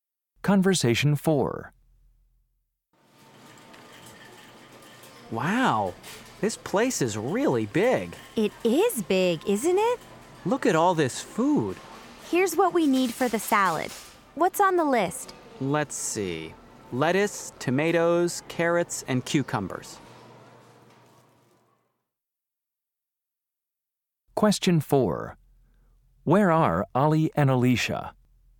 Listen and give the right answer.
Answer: Yeah, these big supermarkets have good produce.